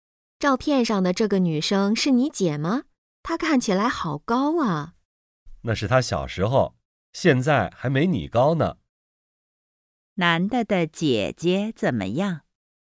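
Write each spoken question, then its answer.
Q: 男的的姐姐怎么样?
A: 现在个子不高,还没女的高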